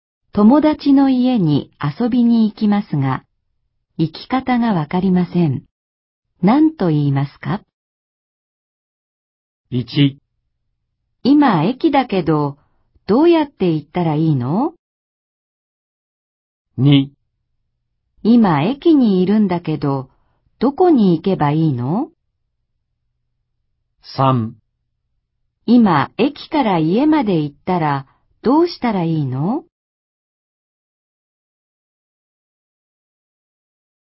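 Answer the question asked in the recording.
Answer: 1: 今駅だけど、どうやって行ったらいいの?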